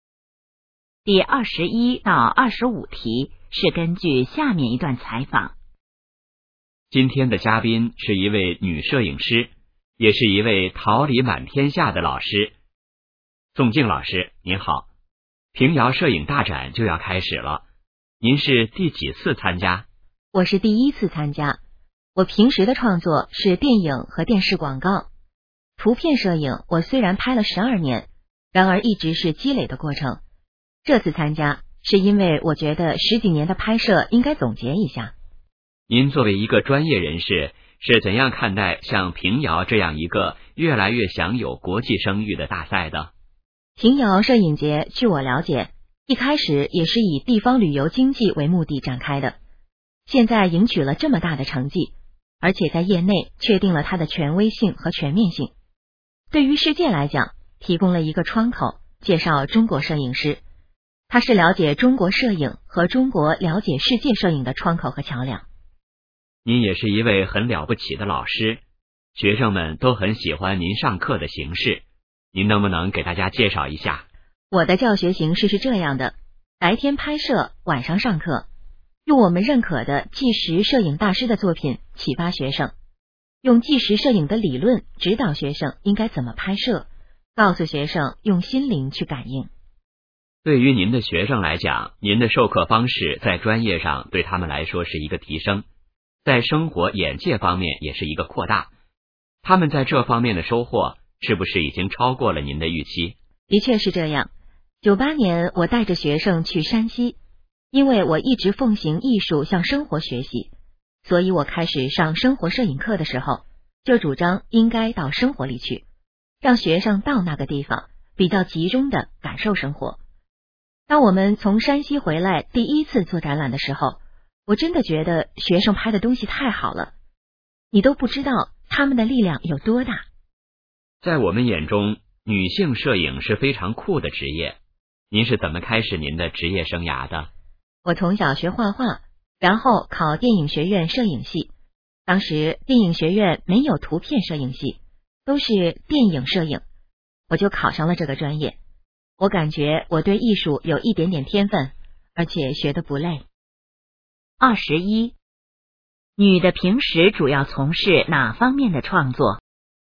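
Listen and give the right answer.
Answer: 电影和电视广告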